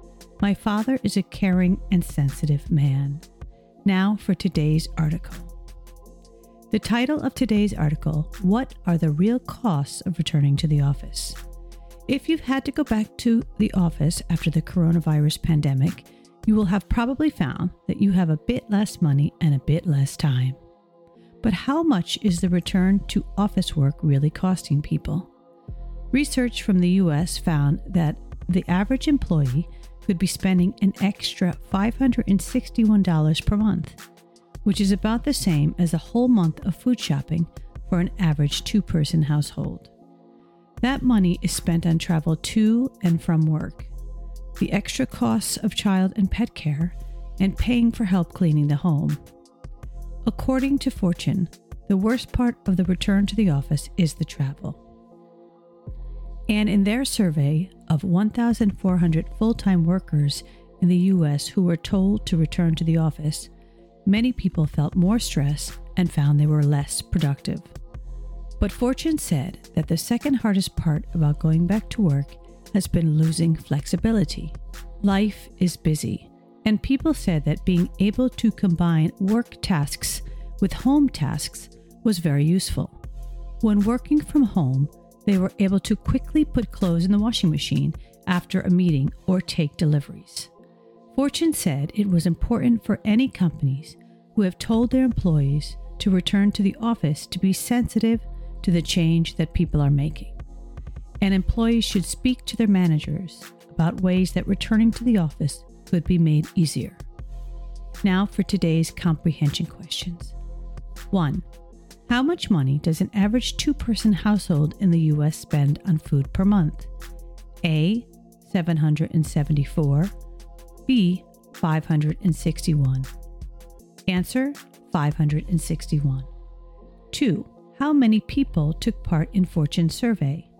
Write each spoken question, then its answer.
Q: How much money does an average two-person household in the U.S. spend on food per month? A. $774. B. $561.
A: $561.